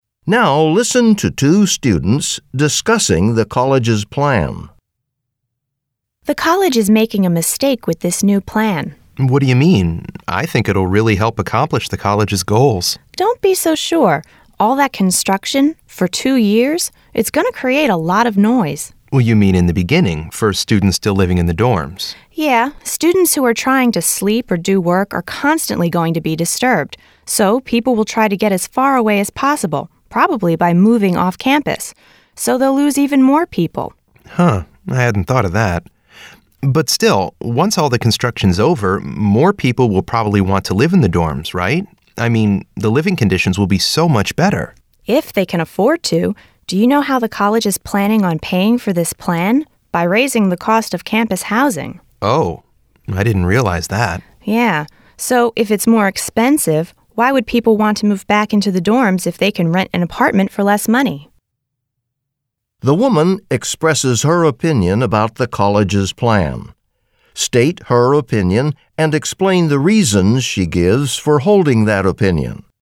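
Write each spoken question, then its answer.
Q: The woman expresses her opinion about the college's plan. State her opinion and explain the reasons she gives for holding that opinion.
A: She thinks the plan is a mistake: two years of construction noise will disturb students and push them off campus, and the plan is paid for by raising housing costs, so students won't come back when cheaper apartments are available.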